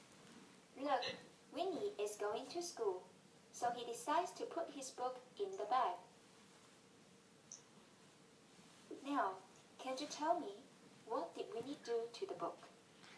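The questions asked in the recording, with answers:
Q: Now, can you tell me, what did Winnie do to the book?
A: He put the book in the bag.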